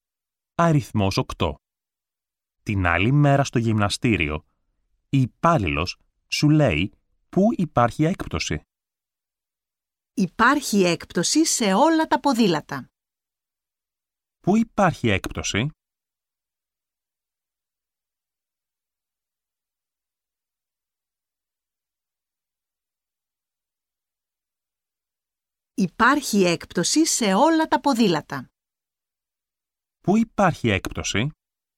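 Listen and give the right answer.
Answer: Σε όλα τα ποδήλατα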